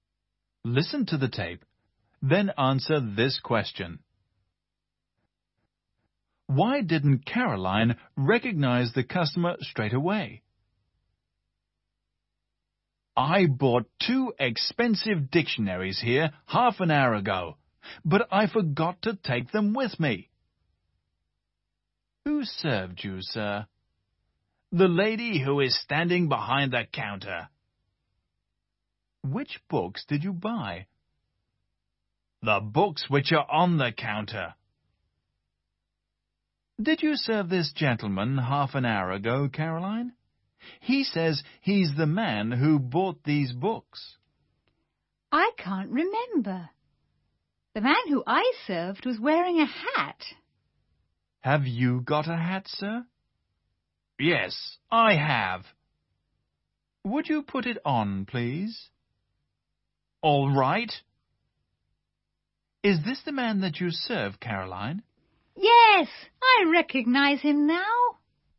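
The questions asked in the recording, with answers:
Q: Why didn't Caroline recognize the customer straight away?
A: Because he wasn't wearing his hat; the man she served had been wearing one.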